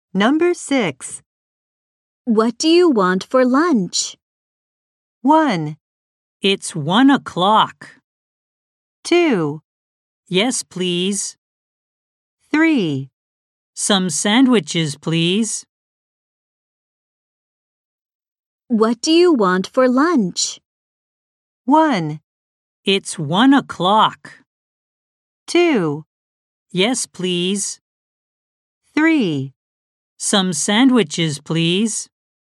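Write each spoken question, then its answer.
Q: What do you want for lunch?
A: 3: Some sandwiches, please.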